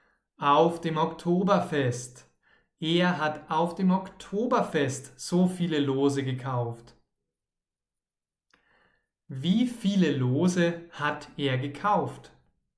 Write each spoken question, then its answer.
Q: Wie viele Lose hat er gekauft?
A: Tausend. Er hat tausend Lose gekauft,